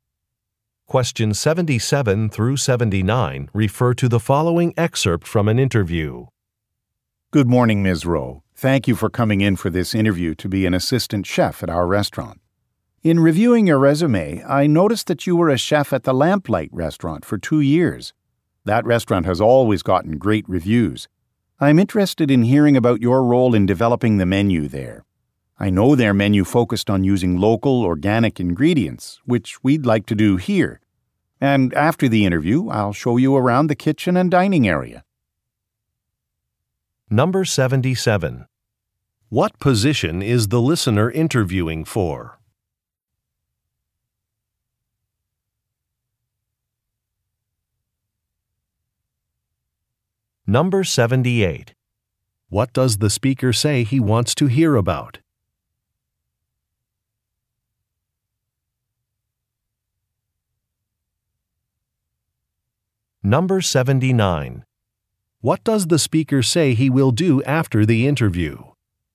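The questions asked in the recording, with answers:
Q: What position is the listener interviewing for?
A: Assistant chef

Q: What does the speaker say he wants to hear about?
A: Her role in developing the menu

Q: What does the speaker say he will do after the interview?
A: Show her the kitchen and dining area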